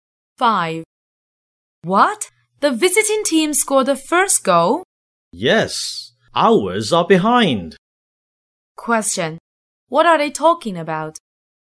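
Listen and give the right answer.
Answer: A football match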